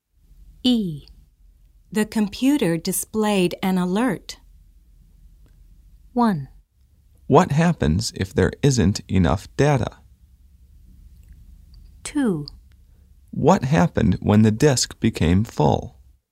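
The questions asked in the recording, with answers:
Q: The computer displayed an alert.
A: 2: What happened when the disk became full?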